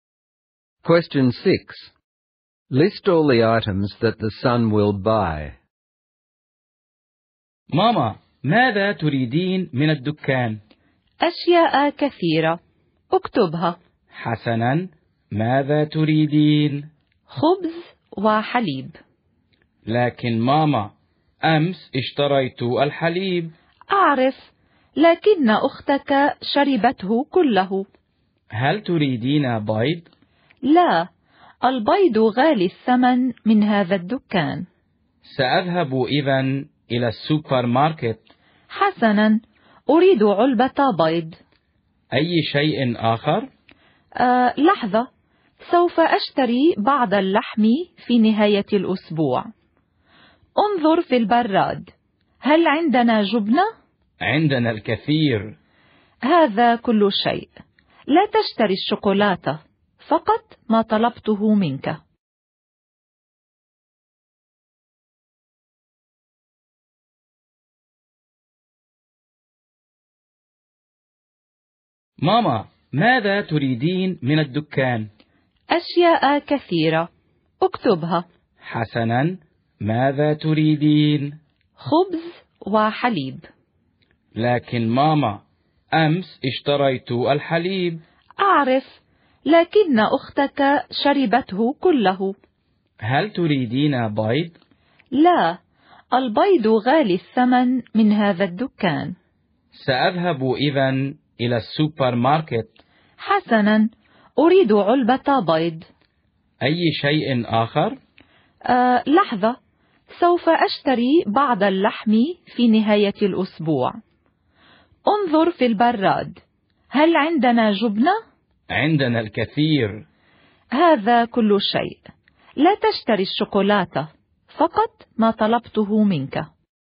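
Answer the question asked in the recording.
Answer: Bread, milk and a carton of eggs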